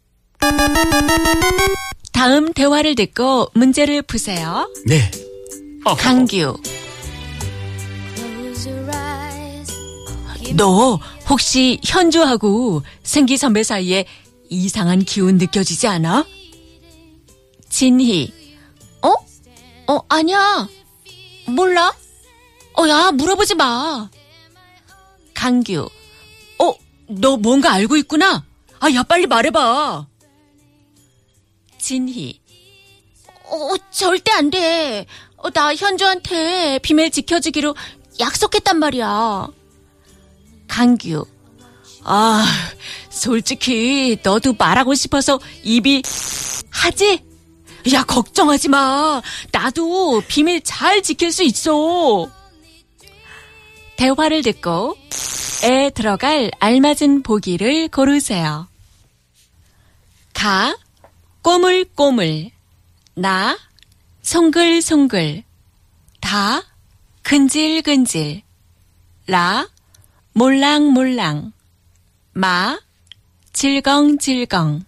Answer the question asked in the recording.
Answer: Da, kunjiri kunjiri, expressing itching, creeping, irritation, something like that.